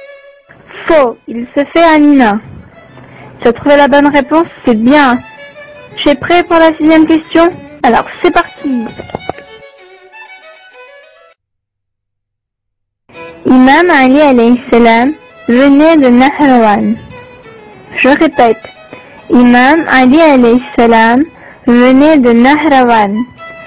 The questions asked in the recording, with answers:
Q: Imam Ali alayhi salam venait de Nahrawan.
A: Faux, il venait du Yémen.